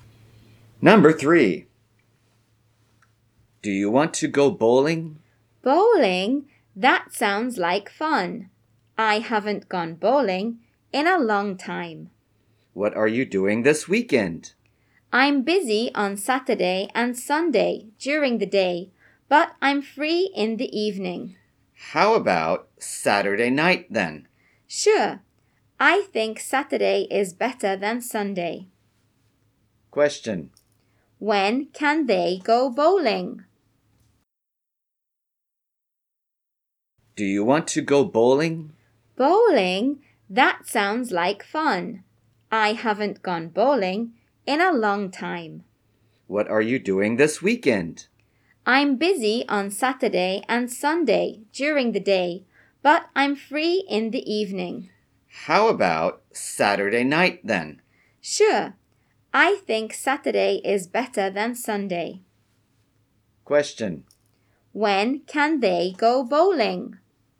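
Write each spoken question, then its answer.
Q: When can they go bowling?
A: Saturday night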